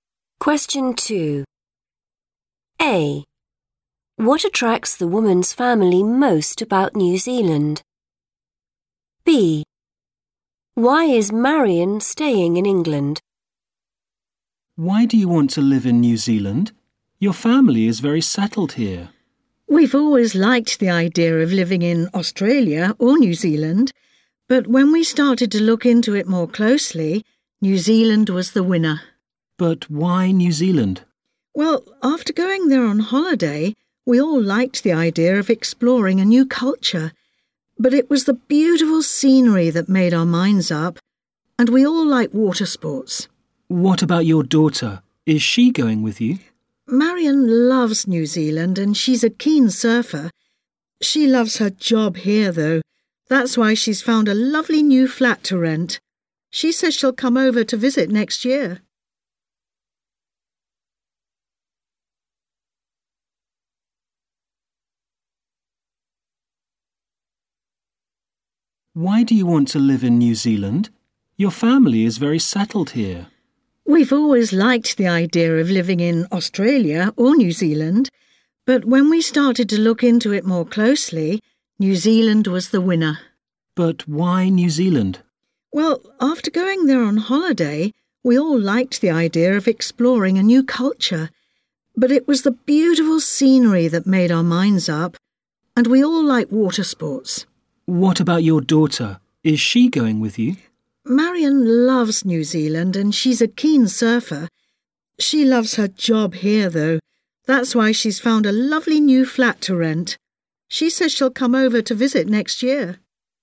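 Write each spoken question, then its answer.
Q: What attracts the woman's family most about New Zealand?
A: the beautiful scenery

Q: Why is Marion staying in England?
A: she loves her job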